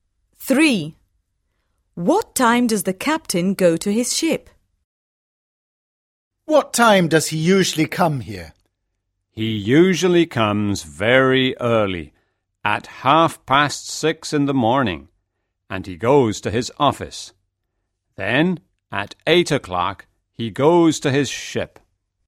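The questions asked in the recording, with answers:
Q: What time does the captain go to his ship?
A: At 8:00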